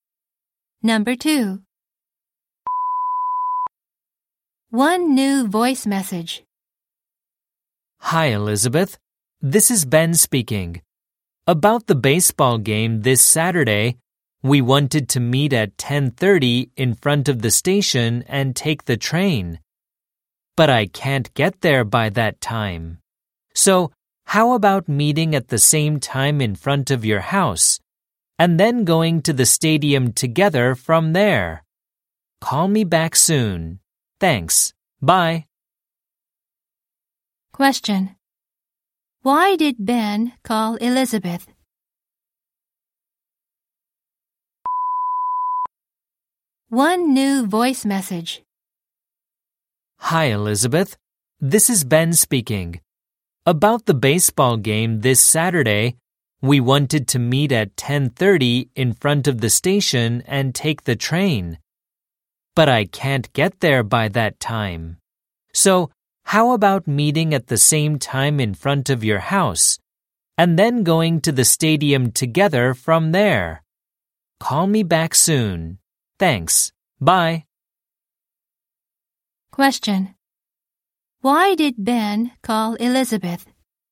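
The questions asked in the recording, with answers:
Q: Why did Ben call Elizabeth?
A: To change the meeting place to the front of her house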